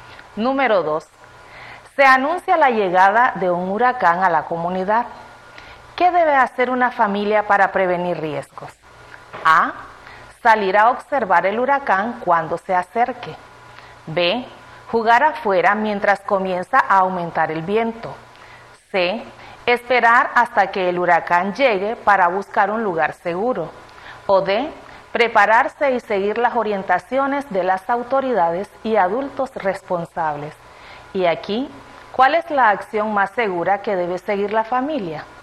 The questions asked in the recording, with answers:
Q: ¿Qué debe hacer una familia para prevenir riesgos?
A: Exacto, es la opción D. La familia debe prepararse y seguir las orientaciones de las autoridades y adultos responsables.